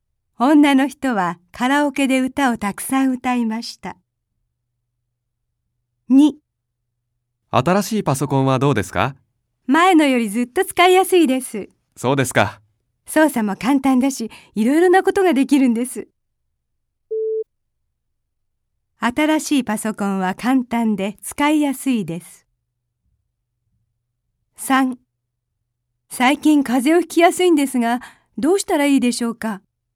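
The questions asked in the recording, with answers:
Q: 新しいパソコンは簡単で使いやすいです。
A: ○(正しい)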